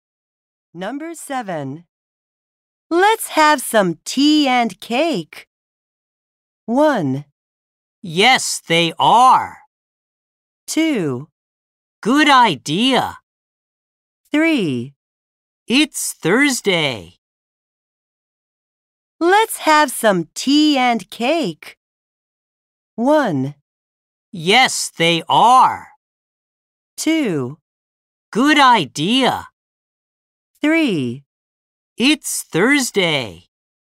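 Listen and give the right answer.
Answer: 2: Good idea.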